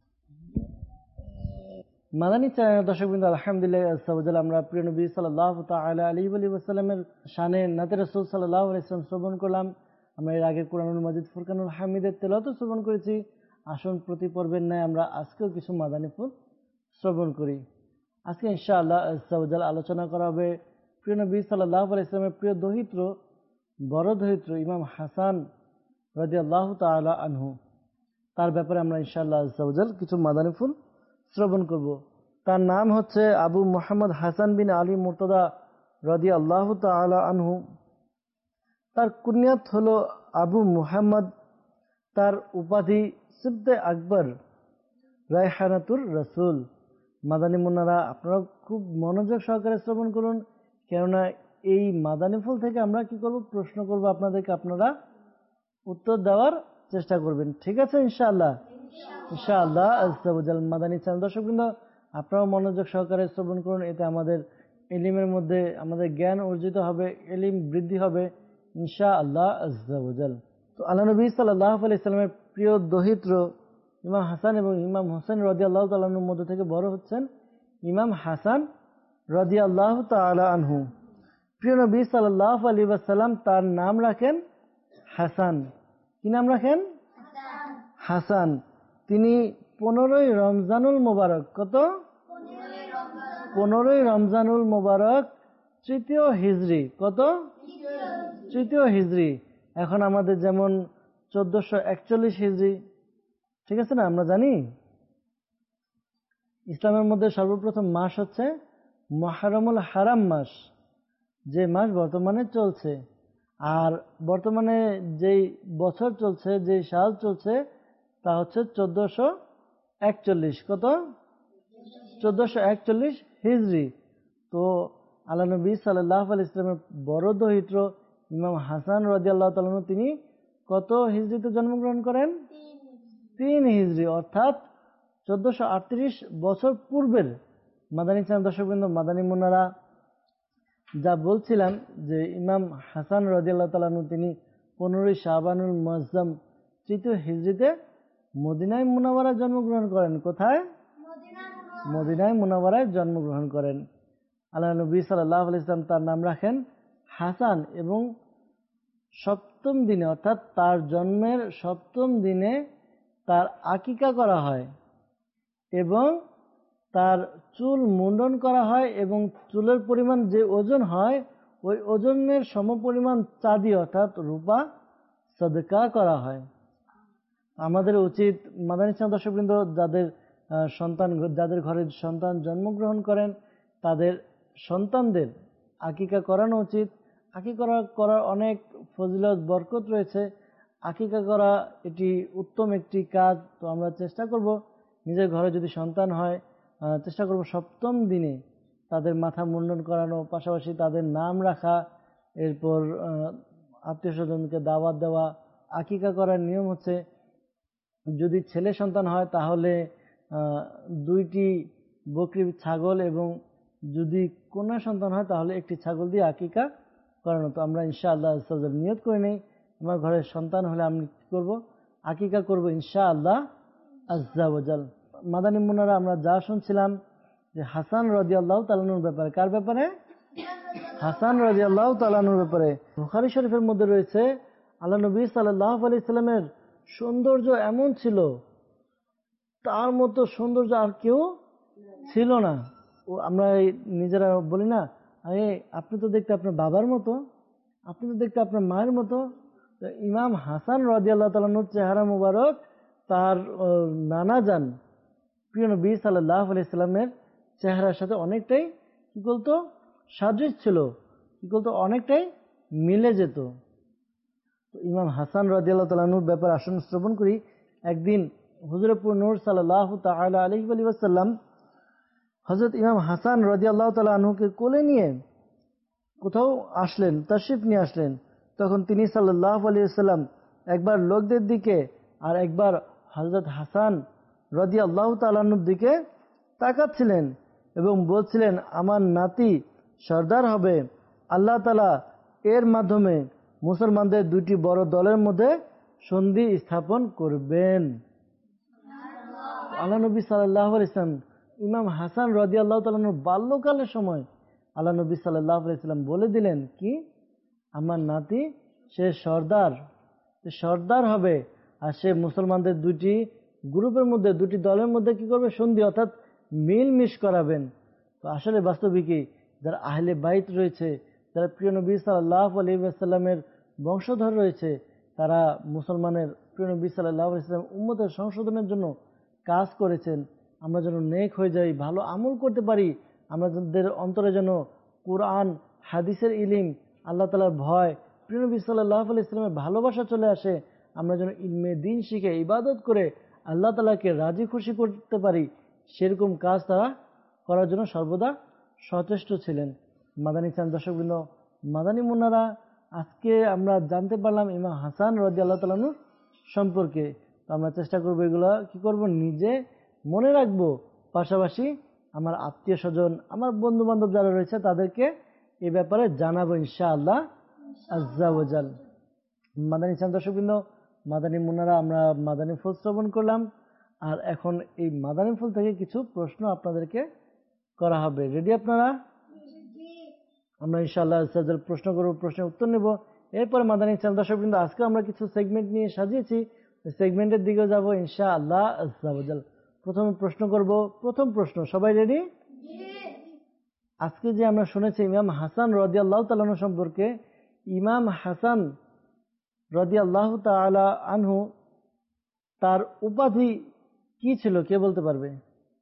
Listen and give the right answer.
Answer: রায়হানাতুর রাসূল।